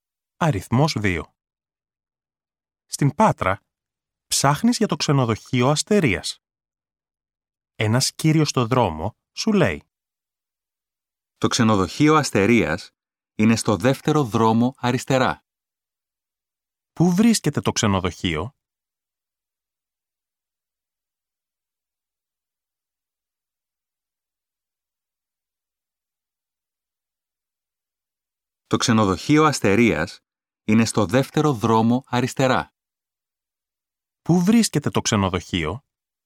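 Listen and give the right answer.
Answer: Στον δεύτερο δρόμο αριστερά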